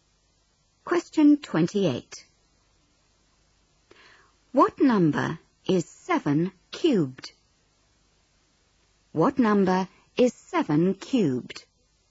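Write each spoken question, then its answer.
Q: What number is 7 cubed?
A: 343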